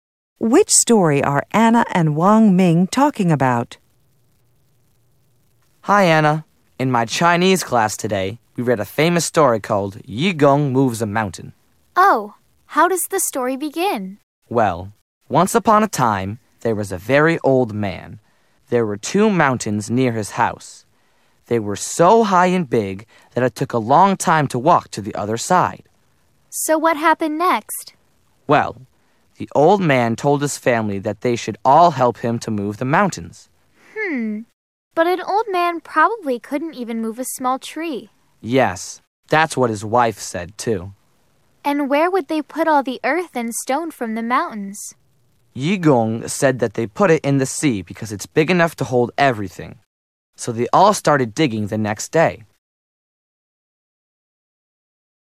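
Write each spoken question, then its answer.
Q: Which story are Anna and Wang Ming talking about?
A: Yu Gong Moves a Mountain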